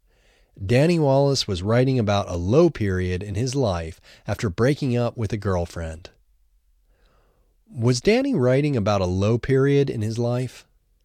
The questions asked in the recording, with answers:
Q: Was Danny writing about a low period in his life?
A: Yes, Danny was writing about a low period in his life.